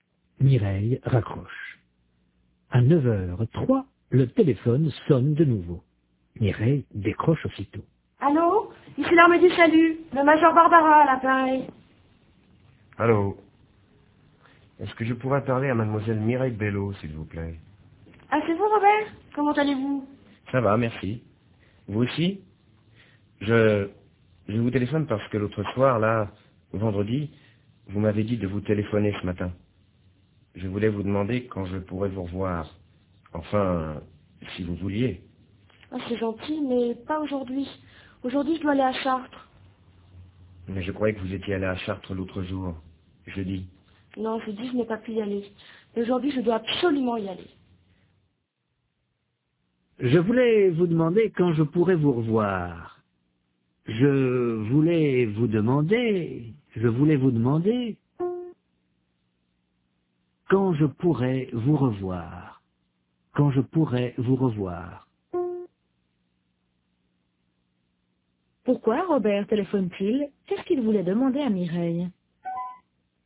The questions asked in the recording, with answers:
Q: Qu'est-ce qu'il voulait demander à Mireille?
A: Il voulait lui demander quand il pourrait la revoir.